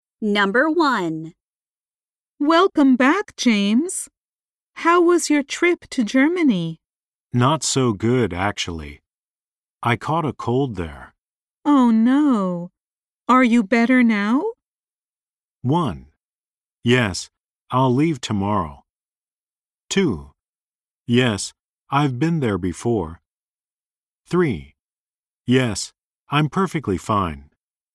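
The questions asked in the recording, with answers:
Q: Oh, no. Are you better now?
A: 3: Yes, I'm perfectly fine.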